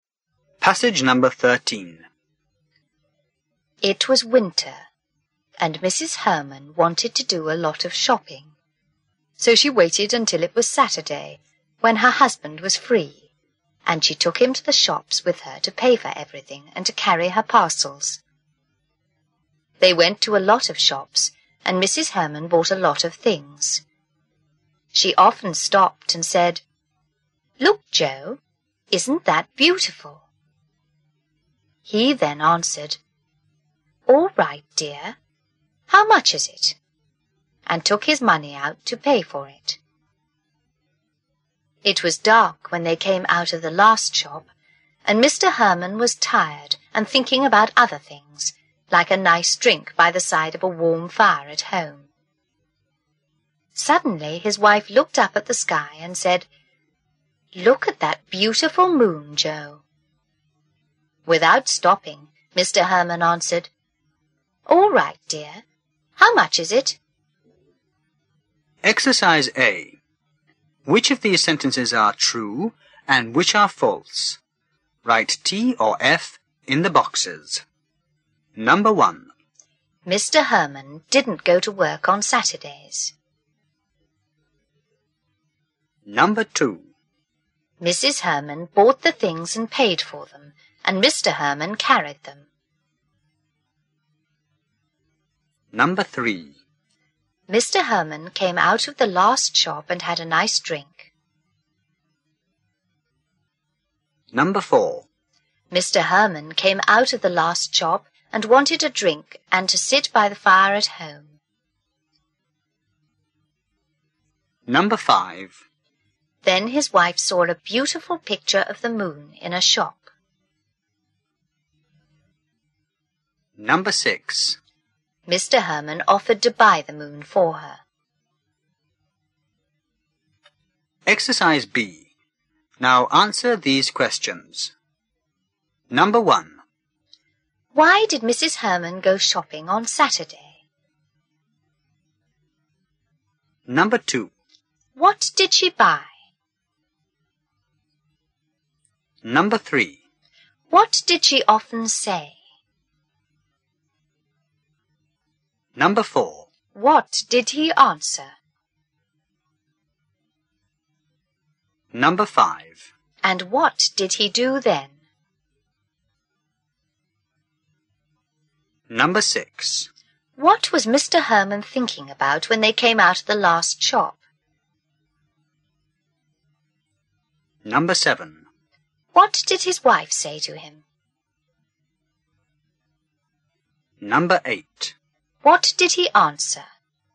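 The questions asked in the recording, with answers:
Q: Why did Mrs. Herman go shopping on Saturday?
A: Because her husband was free to pay for everything and carry her parcels.

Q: What did she buy?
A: A lot of things.

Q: What did she often say?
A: "Look, Joe, isn't that beautiful?"

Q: What did he answer?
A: "All right, dear. How much is it?"

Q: And what did he do then?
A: He took his money out to pay for it.

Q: What was Mr. Herman thinking about when they came out of the last shop?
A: A nice drink by the side of a warm fire at home.

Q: What did his wife say to him?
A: "Look at that beautiful moon, Joe."

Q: What did he answer?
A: "All right, dear. How much is it?"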